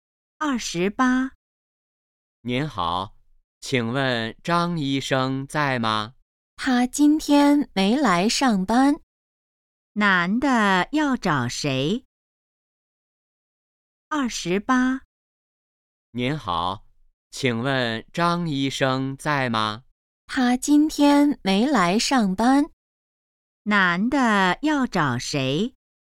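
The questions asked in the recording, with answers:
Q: 男的要找谁?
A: 张医生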